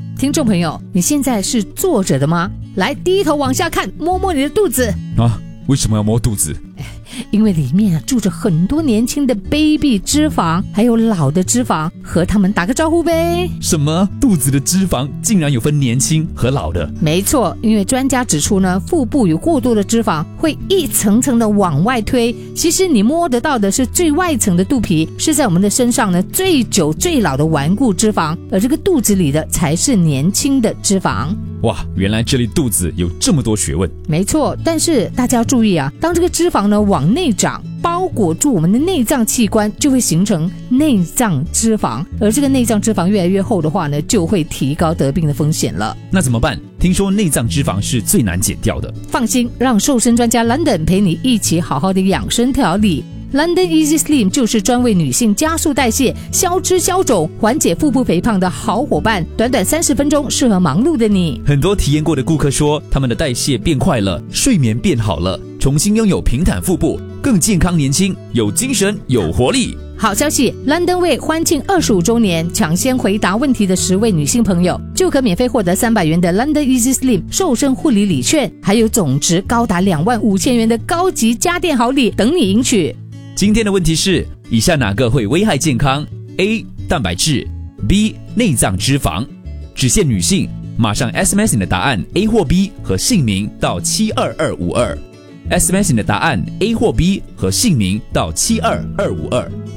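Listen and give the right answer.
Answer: B: 内脏脂肪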